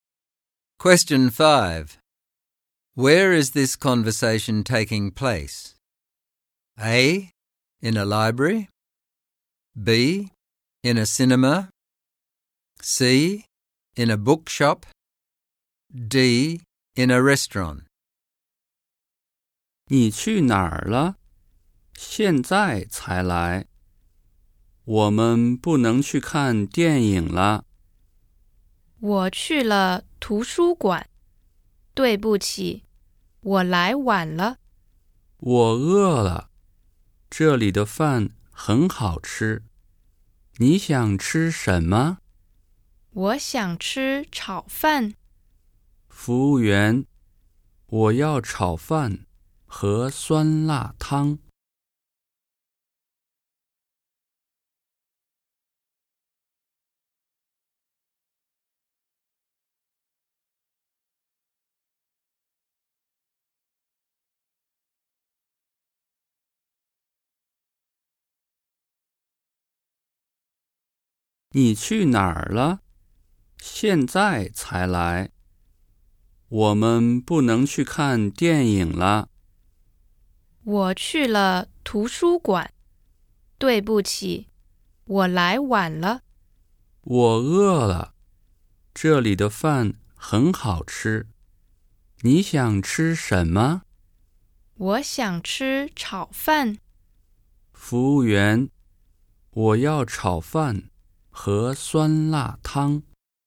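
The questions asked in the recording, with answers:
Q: Where is this conversation taking place?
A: D: In a restaurant.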